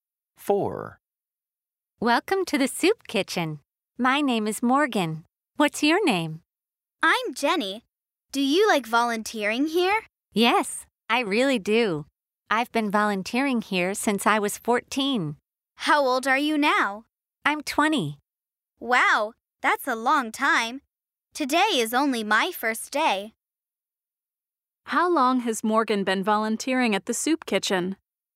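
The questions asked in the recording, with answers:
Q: How long has Morgan been volunteering at the soup kitchen?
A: For 6 years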